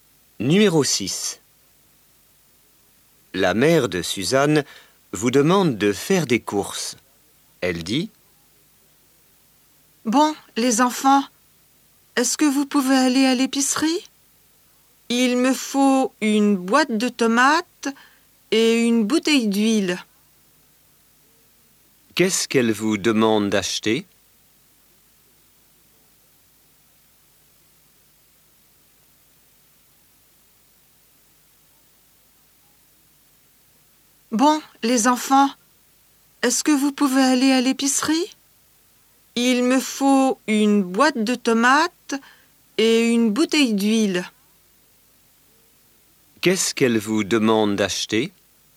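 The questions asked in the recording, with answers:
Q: Qu'est-ce qu'elle vous demande d'acheter?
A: Une boîte de tomates et une bouteille d'huile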